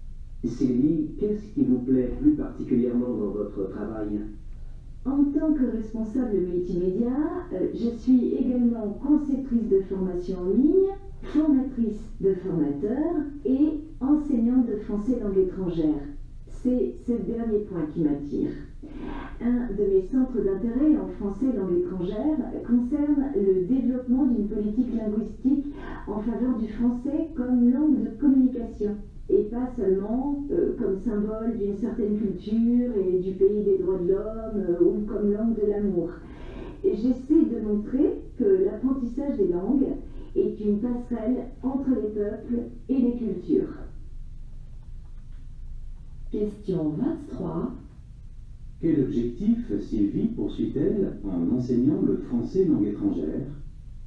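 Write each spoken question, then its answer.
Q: Quel objectif Sylvie poursuit-elle en enseignant le français langue étrangère?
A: Montrer que l'apprentissage des langues est une passerelle entre les peuples et les cultures (promouvoir le français comme langue de communication)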